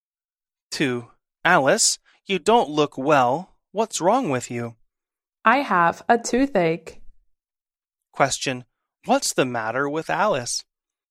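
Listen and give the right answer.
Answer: She has a toothache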